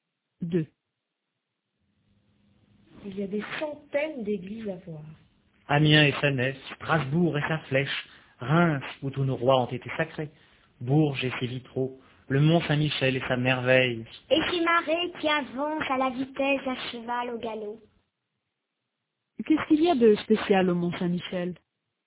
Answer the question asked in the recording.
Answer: Des marées qui avancent à la vitesse d'un cheval au galop.